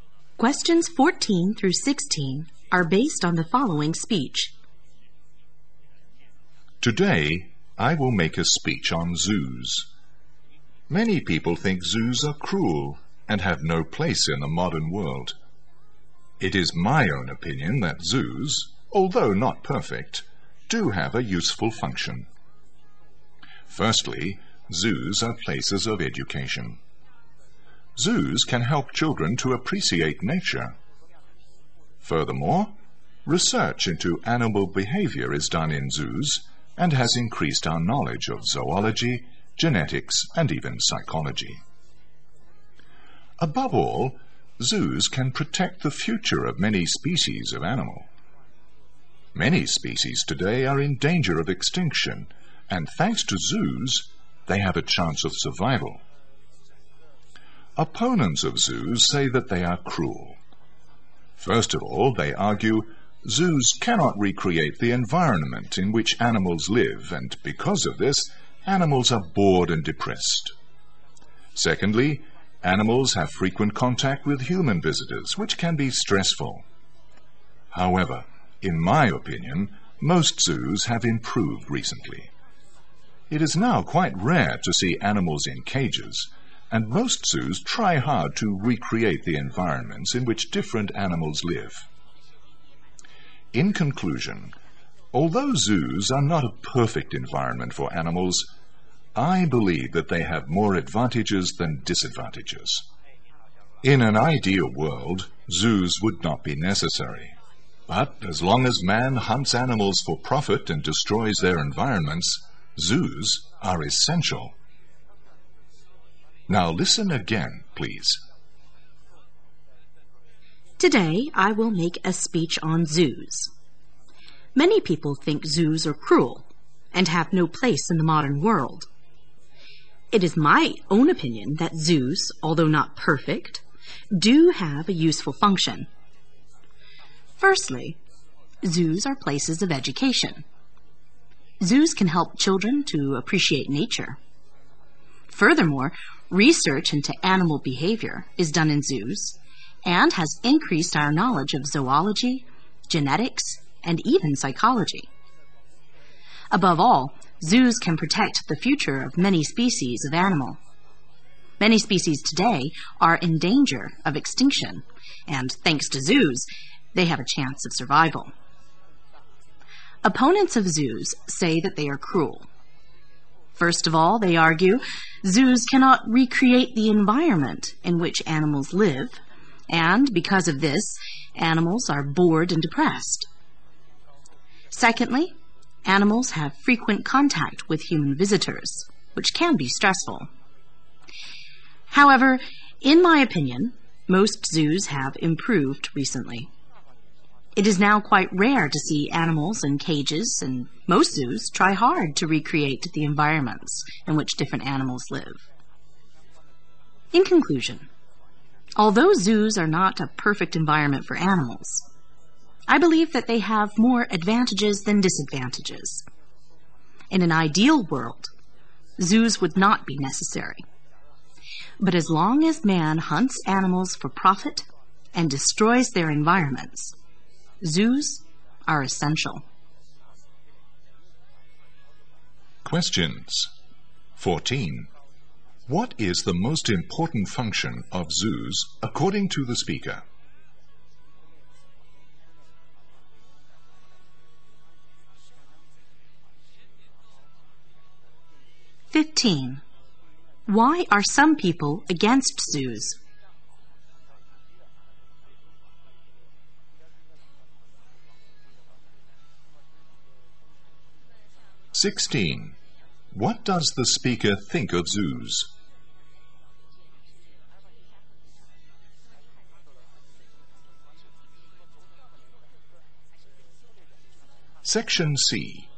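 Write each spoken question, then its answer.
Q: What is the most important function of zoos according to the speaker?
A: Protecting endangered species from extinction

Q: Why are some people against zoos?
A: They think zoos are cruel to animals

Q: What does the speaker think of zoos?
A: They have more advantages than disadvantages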